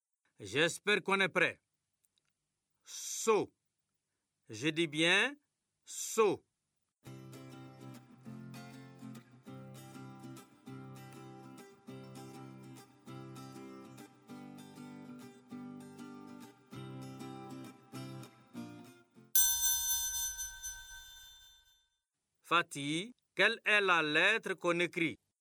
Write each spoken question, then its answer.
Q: Fatih, quelle est la lettre qu'on écrit?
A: Monsieur, c'est la lettre S.